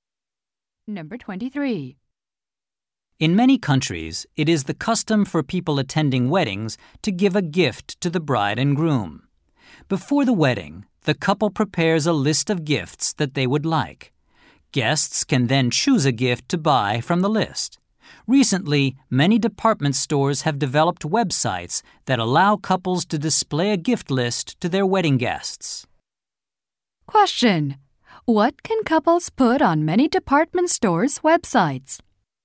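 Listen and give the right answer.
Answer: A list of wedding gifts they want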